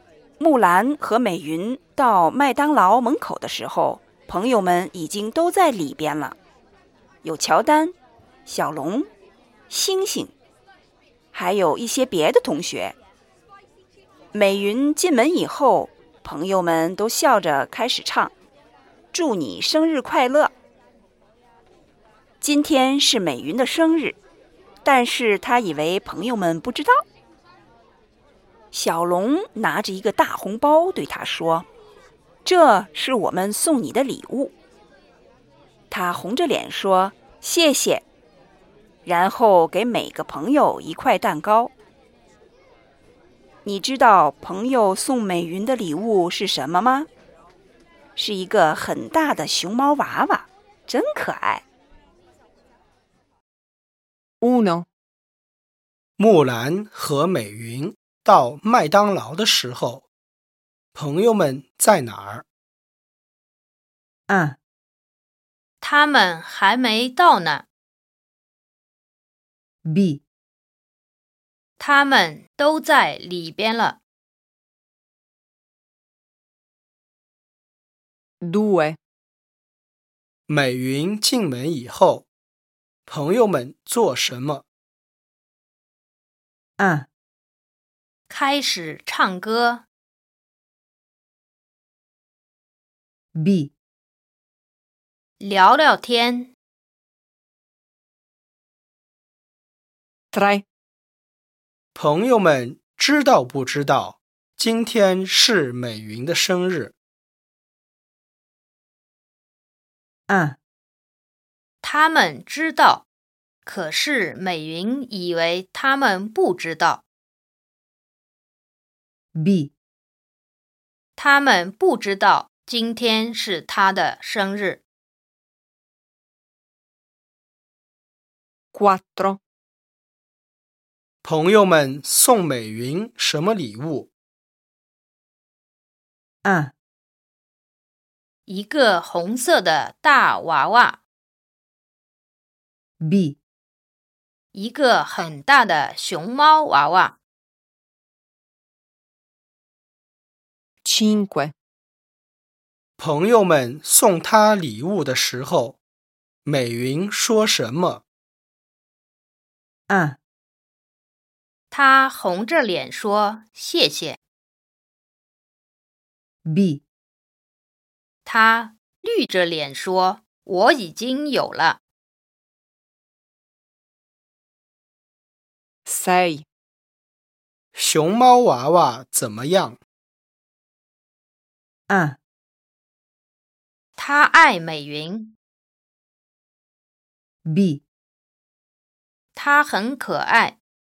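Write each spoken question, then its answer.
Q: 木兰和美云到麦当劳的时候,朋友们在哪儿?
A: B: 他们都在里边了

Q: 美云进门以后,朋友们做什么?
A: A: 开始唱歌

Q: 朋友们知道不知道今天是美云的生日?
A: A: 他们知道。可是美云以为他们不知道。

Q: 朋友们送美云什么礼物?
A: B: 一个很大的熊猫娃娃

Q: 朋友们送他礼物的时候,美云说什么?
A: A: 他红着脸说谢谢

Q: 熊猫娃娃怎么样?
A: B: 他很可爱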